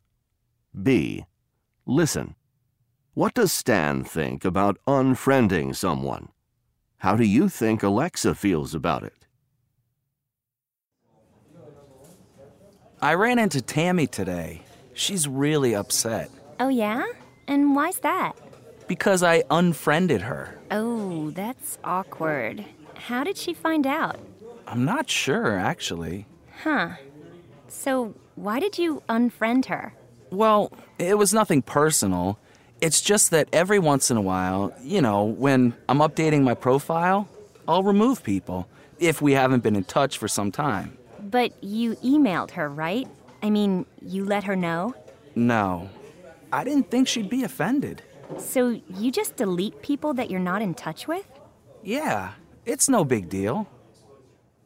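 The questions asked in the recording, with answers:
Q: What does Stan think about unfriending someone?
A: He thinks it's no big deal.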